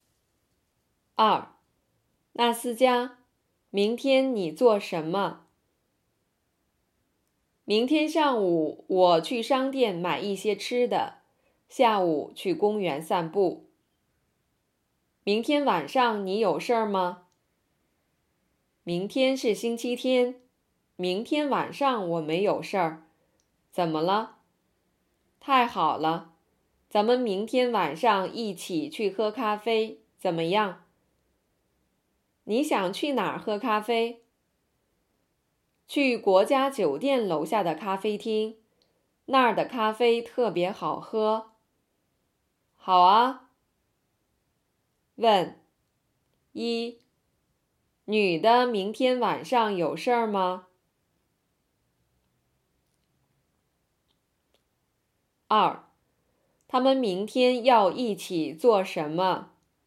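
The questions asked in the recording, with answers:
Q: 女的明天晚上有事儿吗?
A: 没有事儿

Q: 他们明天要一起做什么?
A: 一起去喝咖啡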